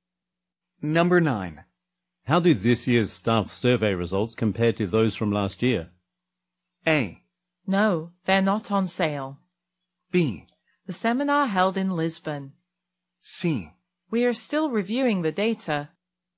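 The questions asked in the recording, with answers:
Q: How do this year's staff survey results compare to those from last year?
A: C: We are still reviewing the data.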